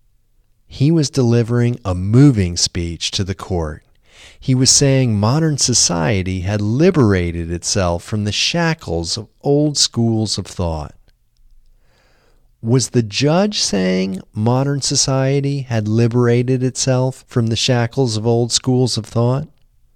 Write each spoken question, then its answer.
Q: Was the judge saying modern society had liberated itself from the shackles of old schools of thought?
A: No, the judge wasn't saying modern society had liberated itself from the shackles of old schools of thought.